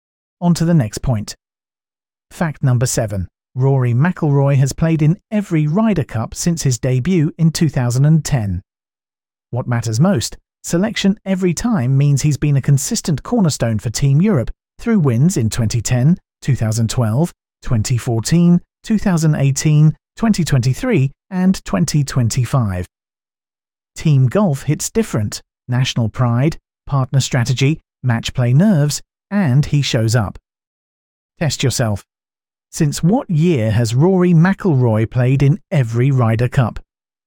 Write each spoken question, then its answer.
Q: Since what year has Rory McIlroy played in every Ryder Cup?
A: Correct answer, 2010.